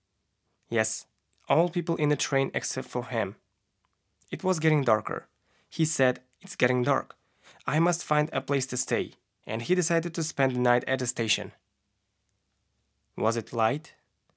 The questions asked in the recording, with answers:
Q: Was it light?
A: No, it wasn't light.